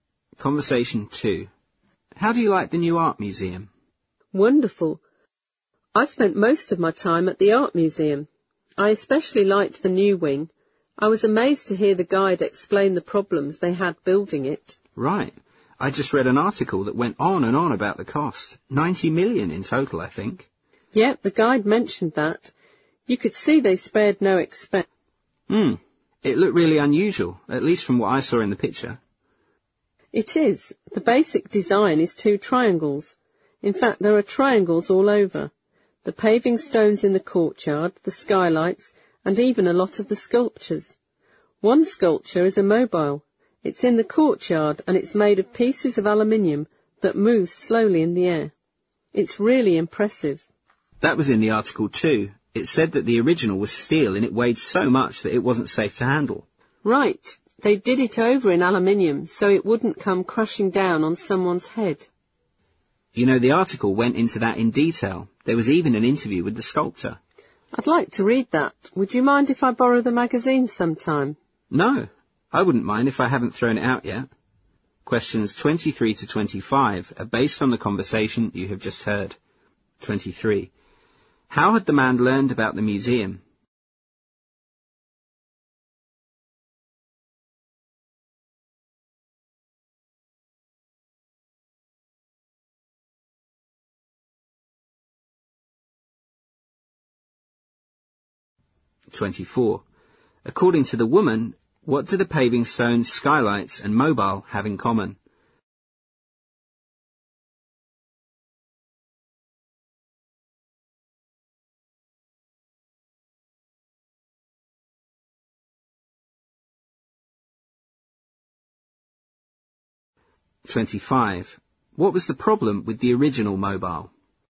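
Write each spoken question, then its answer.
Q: How had the man learned about the museum?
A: From a magazine article

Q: According to the woman, what do the paving stones, skylights, and mobile have in common?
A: They are all triangular

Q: What was the problem with the original mobile?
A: It was made of steel and too heavy to be safe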